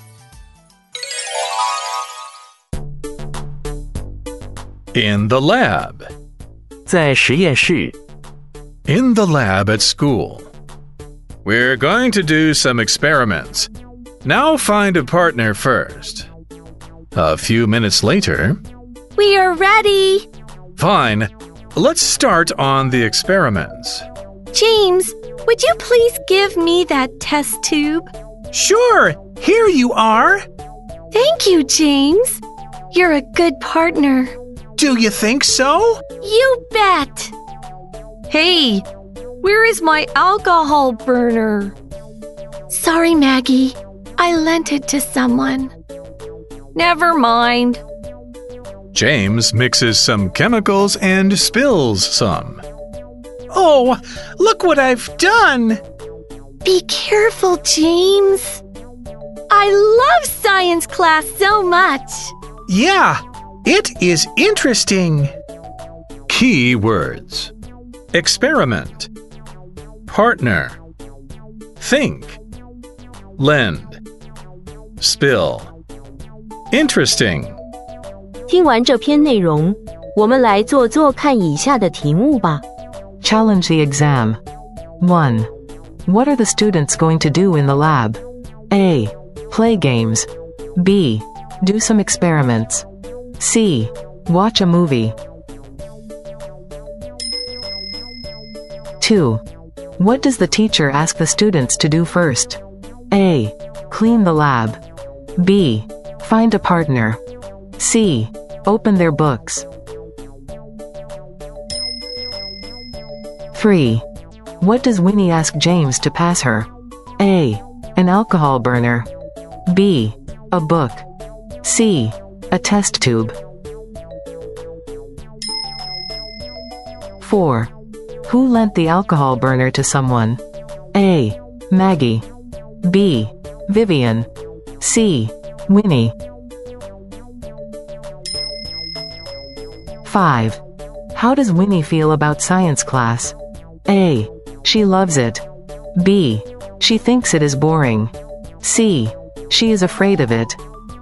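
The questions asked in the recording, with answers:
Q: What are the students going to do in the lab?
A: B: Do some experiments.

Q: What does the teacher ask the students to do first?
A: B: Find a partner.

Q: What does Winnie ask James to pass her?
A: C: A test tube.

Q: How does Winnie feel about science class?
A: A: She loves it.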